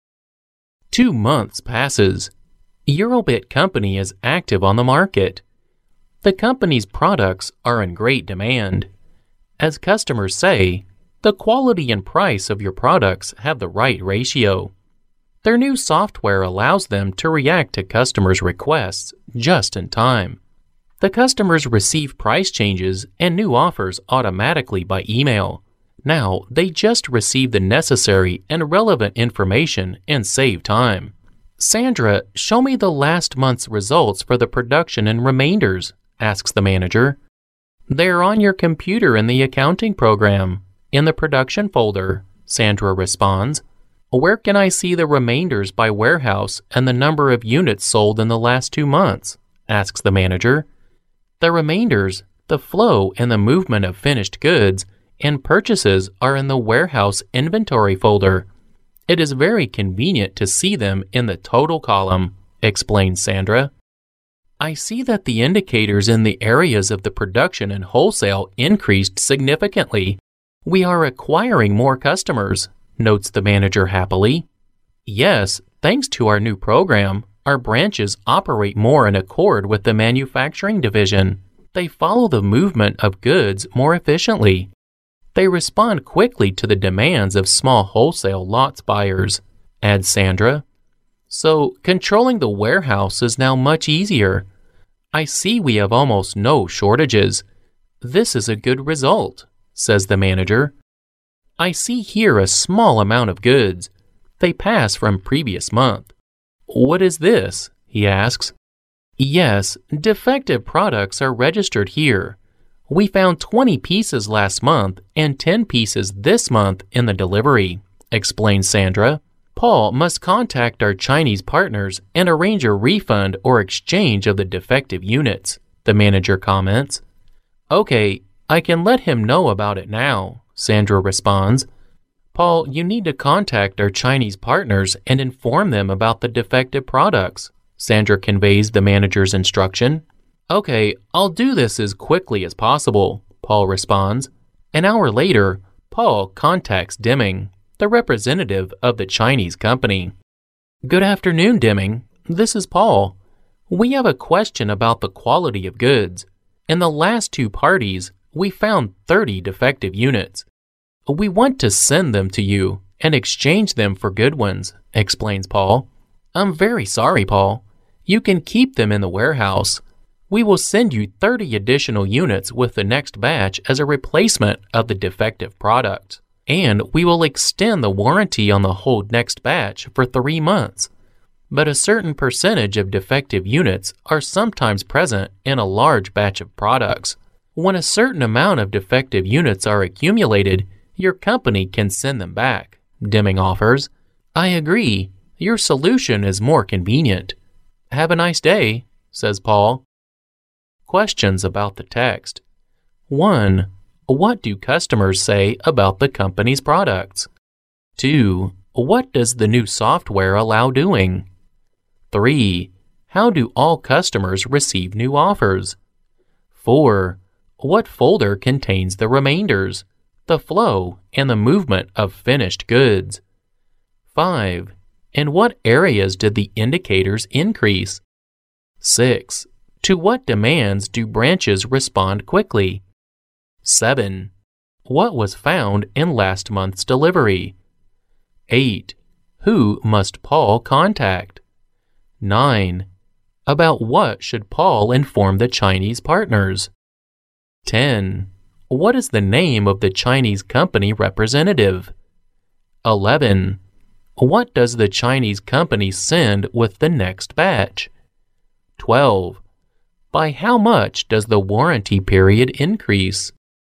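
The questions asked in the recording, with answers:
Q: What do customers say about the company's products?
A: The quality and price have the right ratio

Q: What does the new software allow doing?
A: React to customers' requests just in time

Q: How do all customers receive new offers?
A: Automatically by email

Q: What folder contains the remainders, the flow, and the movement of finished goods?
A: The warehouse inventory folder

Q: In what areas did the indicators increase?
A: Production and wholesale

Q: To what demands do branches respond quickly?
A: The demands of small wholesale lots buyers

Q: What was found in last month's delivery?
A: 20 defective pieces

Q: Who must Paul contact?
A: The Chinese partners

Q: About what should Paul inform the Chinese partners?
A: About the defective products

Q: What is the name of the Chinese company representative?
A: Deming

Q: What does the Chinese company send with the next batch?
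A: 30 additional units to replace the defective ones

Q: By how much does the warranty period increase?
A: 3 months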